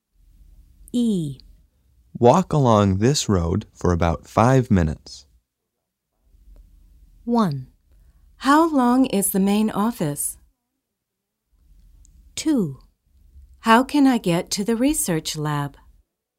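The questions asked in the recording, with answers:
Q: Walk along this road for about 5 minutes.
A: 2: How can I get to the research lab?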